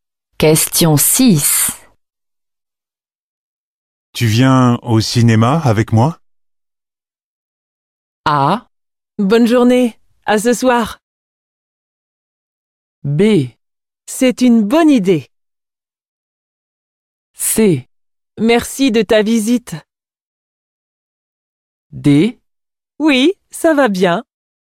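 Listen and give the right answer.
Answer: B: C'est une bonne idée.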